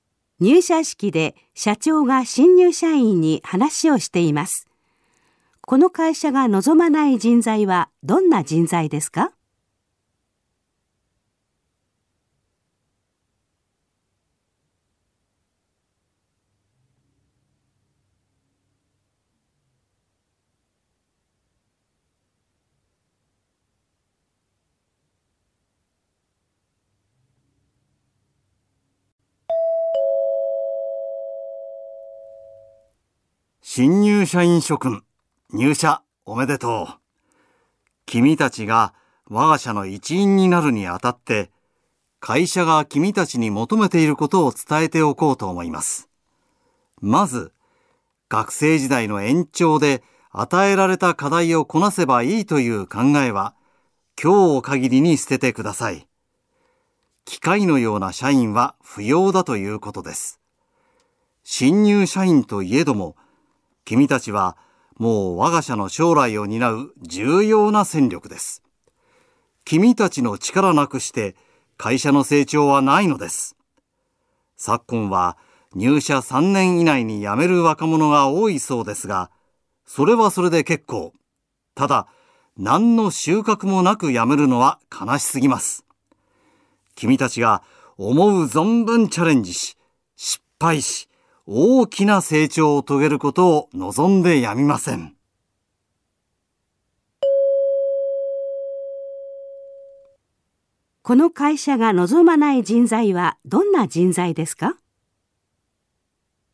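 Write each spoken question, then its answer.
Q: この会社が望まない人材はどんな人材ですか?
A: 与えられた課題をこなすだけの機械のような社員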